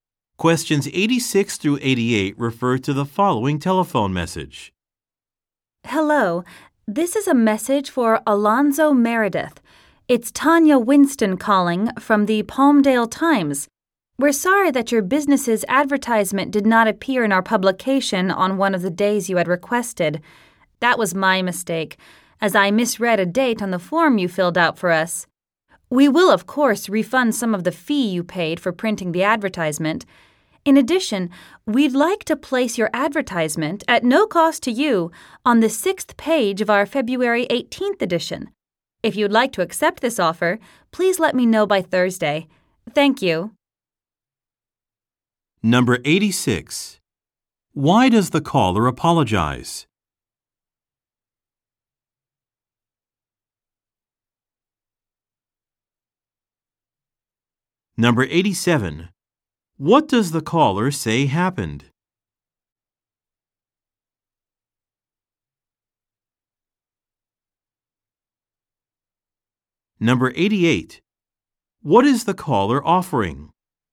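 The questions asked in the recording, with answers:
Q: Why does the caller apologize?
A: The business's advertisement did not appear on a requested day

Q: does the caller say happened?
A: She misread a date on the form

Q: What is the caller offering?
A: A free advertisement in the February 18th edition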